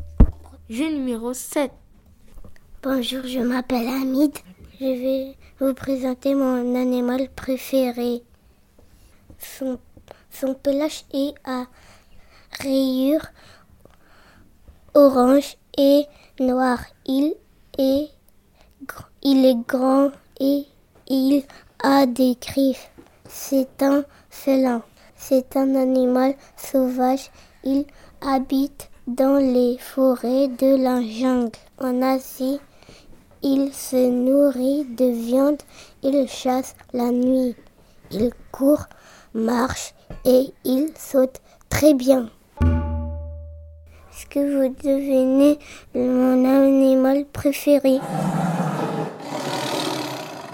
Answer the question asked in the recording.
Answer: Mon animal préféré était le tigre.